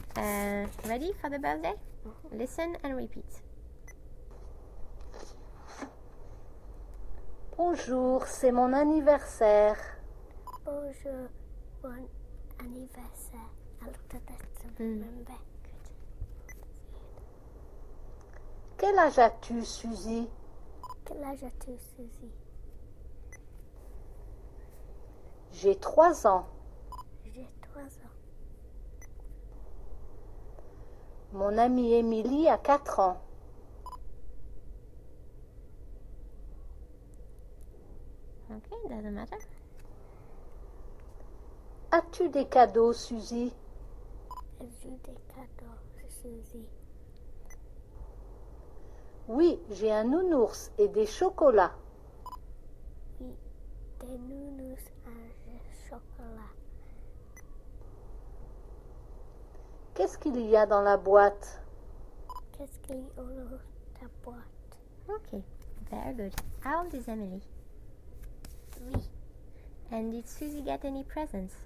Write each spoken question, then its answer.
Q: And did Suzy get any presents?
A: Yes.